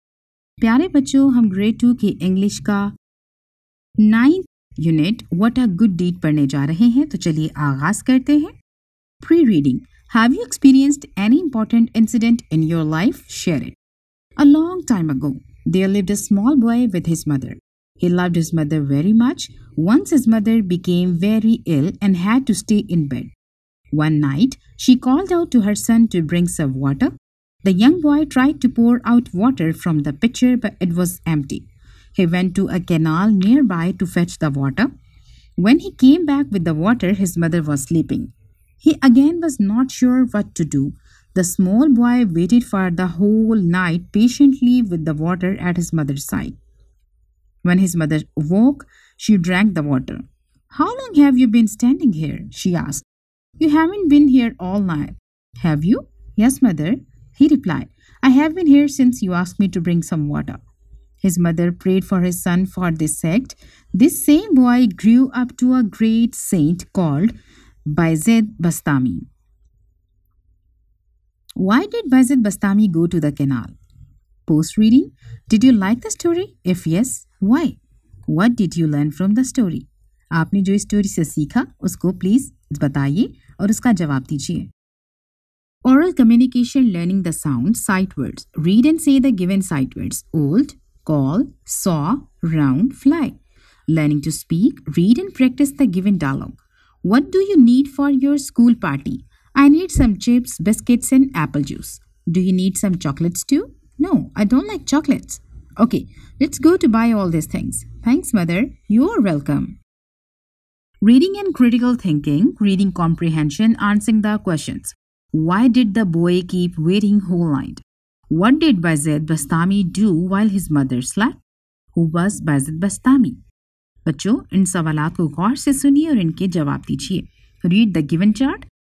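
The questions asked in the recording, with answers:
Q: Why did Bayezid Bastami go to the canal?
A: To fetch water for his sick mother

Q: Why did the boy keep waiting whole night?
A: Because his mother was sleeping and he waited with the water until she woke up

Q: What did Bayezid Bastami do while his mother slept?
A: He waited patiently all night at her side with the water

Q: Who was Bayezid Bastami?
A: A great saint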